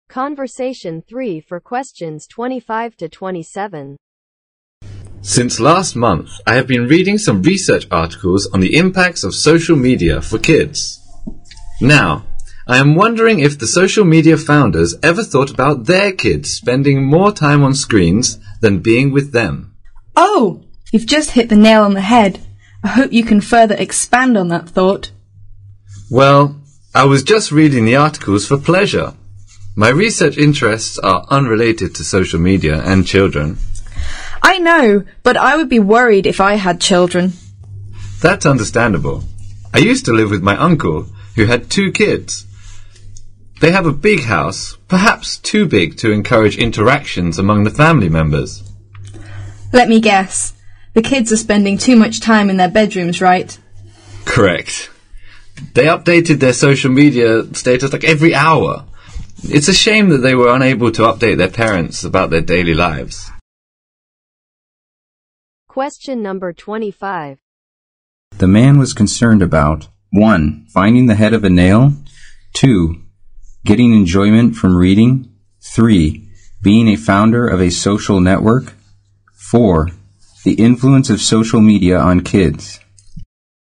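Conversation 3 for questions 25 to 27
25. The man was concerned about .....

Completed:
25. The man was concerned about The influence of social media on kids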